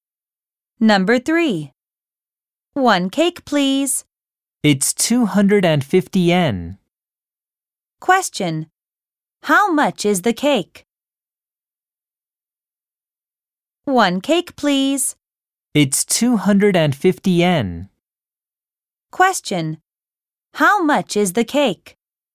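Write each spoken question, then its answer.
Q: How much is the cake?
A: 250 yen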